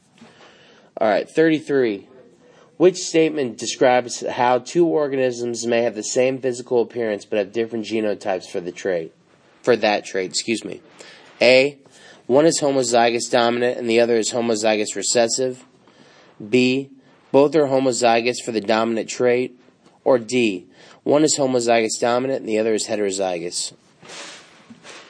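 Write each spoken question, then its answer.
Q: Which statement describes how two organisms may have the same physical appearance but have different genotypes for that trait?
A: D: One is homozygous dominant and the other is heterozygous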